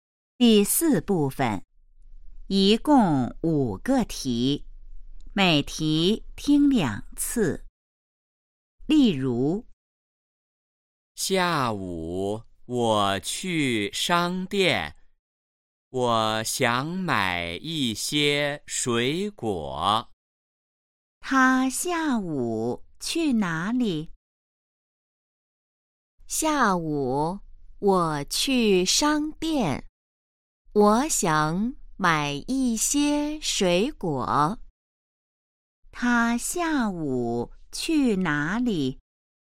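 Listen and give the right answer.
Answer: 商店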